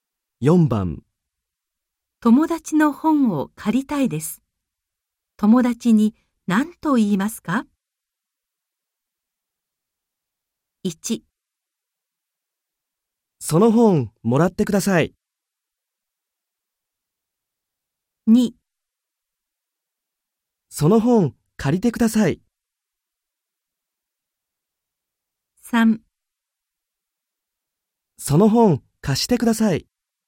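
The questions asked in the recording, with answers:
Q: 友達の本を借りたいです。友達に何と言いますか?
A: 3: その本貸してください。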